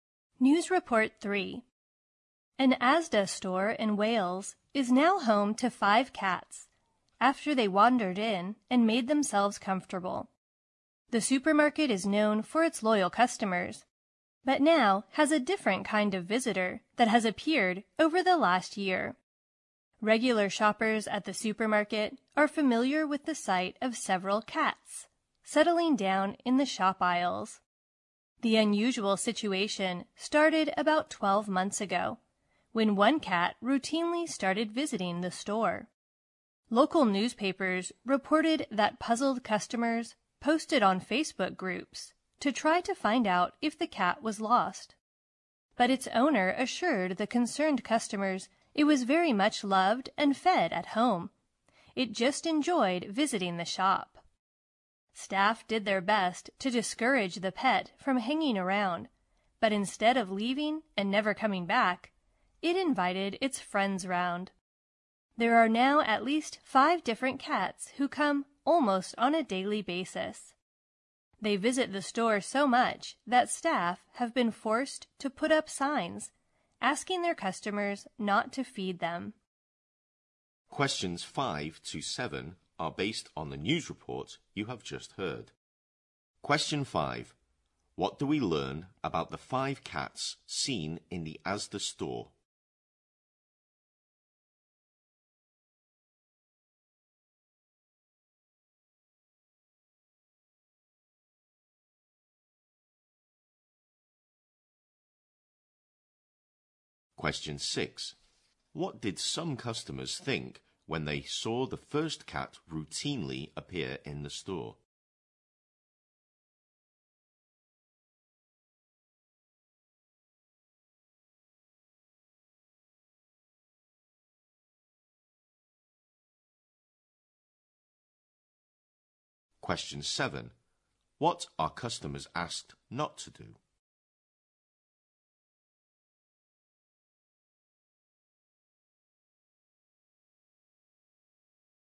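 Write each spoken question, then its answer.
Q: What do we learn about the 5 cats seen in the Asda store?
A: They come to the store almost daily and settle in the aisles

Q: What did some customers think when they saw the first cat routinely appear in the store?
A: That the cat was lost

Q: What are customers asked not to do?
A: Feed the cats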